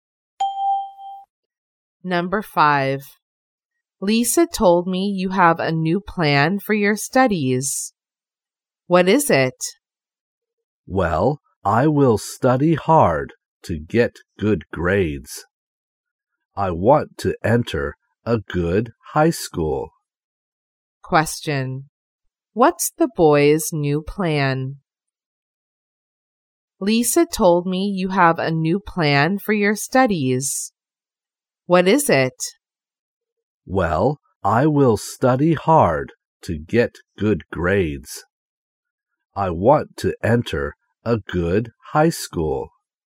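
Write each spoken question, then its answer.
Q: What's the boy's new plan?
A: To study hard to get good grades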